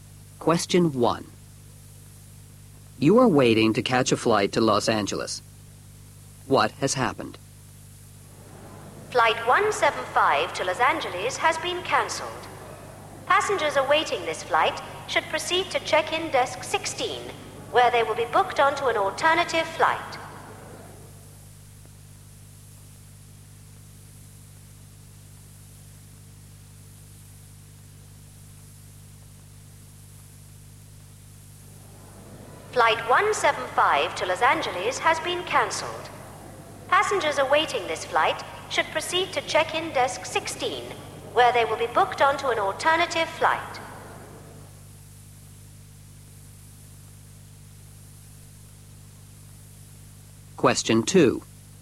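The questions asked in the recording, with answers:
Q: What has happened?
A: Flight 175 to Los Angeles has been cancelled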